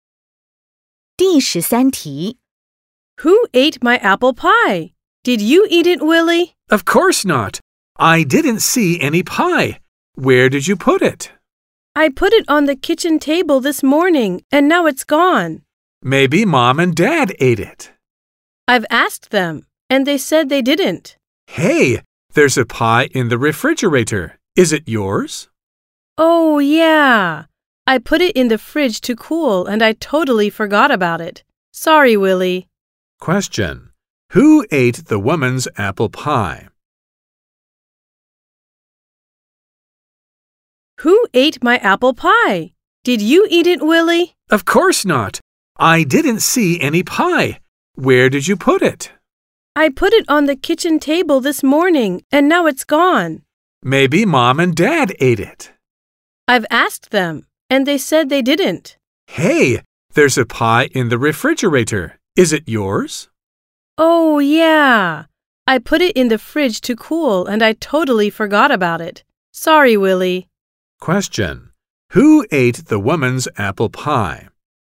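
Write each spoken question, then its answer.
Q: Who ate the woman's apple pie?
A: Nobody; the pie was in the fridge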